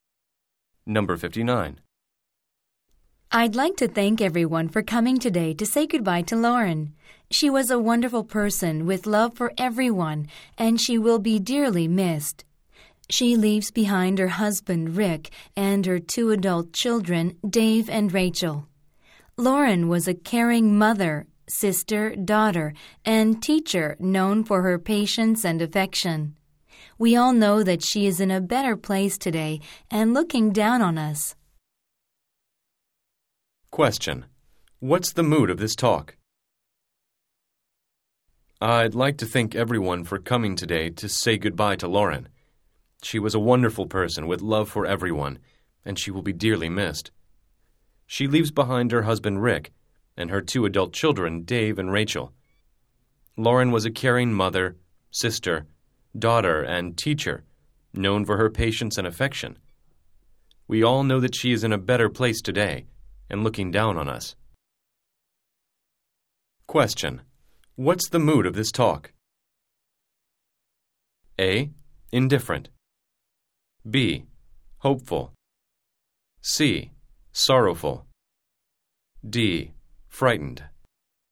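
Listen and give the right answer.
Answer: C: Sorrowful.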